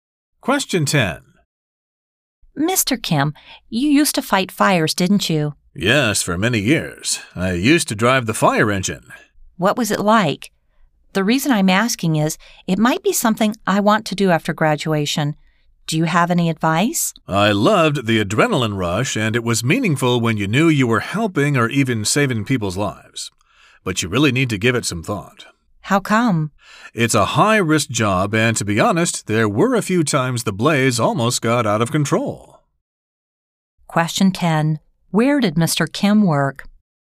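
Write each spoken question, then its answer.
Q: Where did Mr. Kim work?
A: At a fire station (he was a firefighter)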